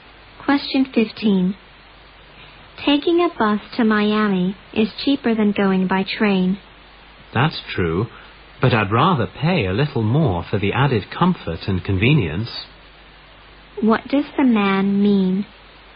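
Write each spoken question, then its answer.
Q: What does the man mean?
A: He prefers to take the train for comfort and convenience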